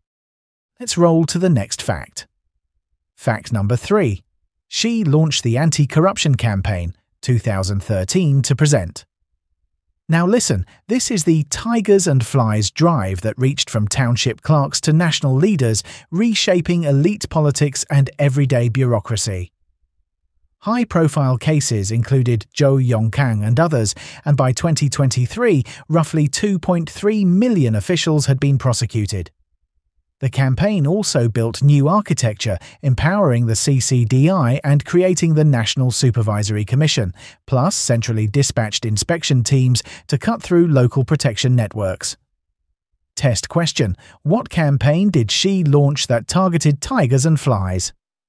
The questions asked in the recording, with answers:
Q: What campaign did Xi launch that targeted tigers and flies?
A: Correct answer. The anti-corruption campaign.